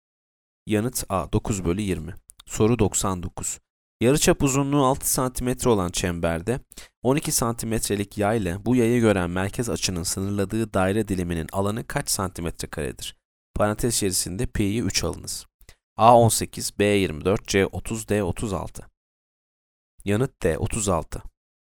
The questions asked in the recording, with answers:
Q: Yarıçap uzunluğu 6 santimetre olan çemberde 12 santimetrelik yay ile bu yayı gören merkez açının sınırladığı daire diliminin alanı kaç santimetre karedir?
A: Yanıt D 36.